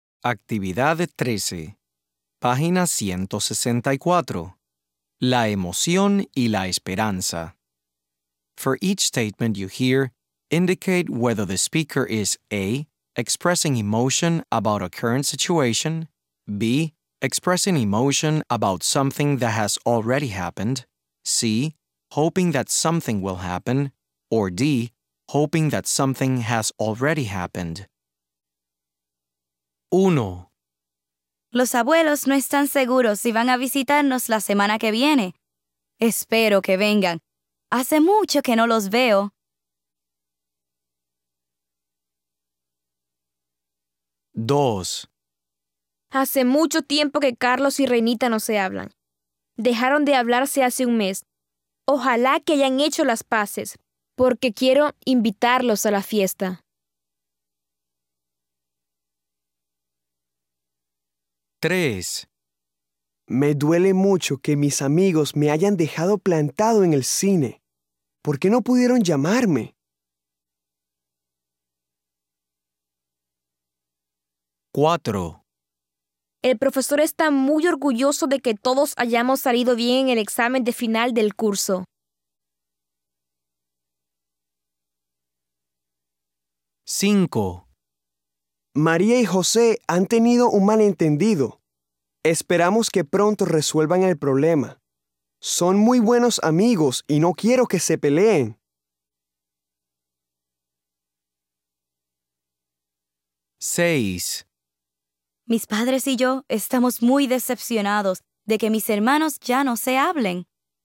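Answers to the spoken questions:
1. C: hoping that something will happen
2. D: hoping that something has already happened
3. B: expressing emotion about something that has already happened
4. B: expressing emotion about something that has already happened
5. C: hoping that something will happen
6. A: expressing emotion about a current situation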